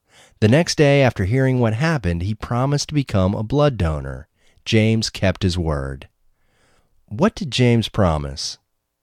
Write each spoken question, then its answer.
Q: What did James promise?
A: James promised to become a blood donor.